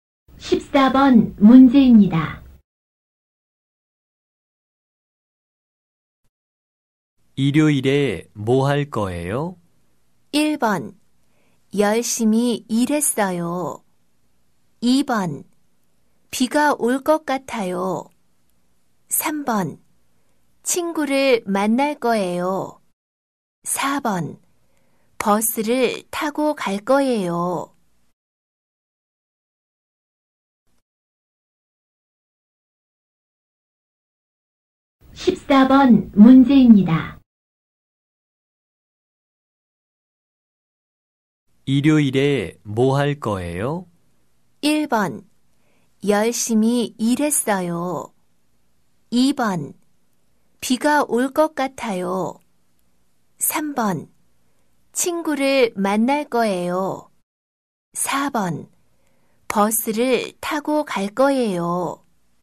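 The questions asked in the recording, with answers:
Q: 일요일에 뭐 할 거예요?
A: 3: 친구를 만날 거예요.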